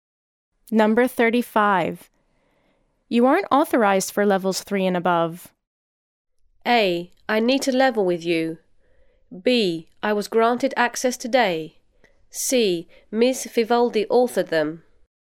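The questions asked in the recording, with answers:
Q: You aren't authorized for levels 3 and above.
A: B: I was granted access today.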